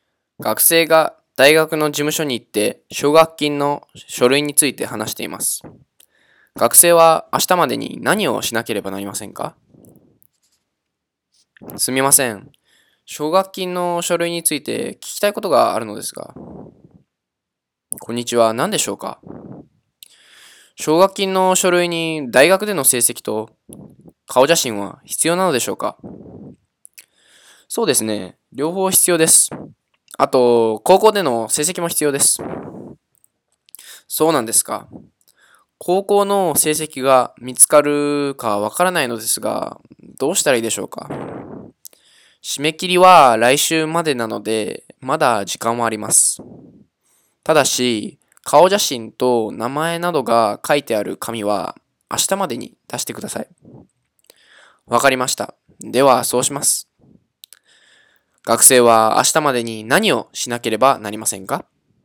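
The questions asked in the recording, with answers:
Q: 学生は明日までに何をしなければなりませんか?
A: 顔写真と名前などが書いてある紙を出す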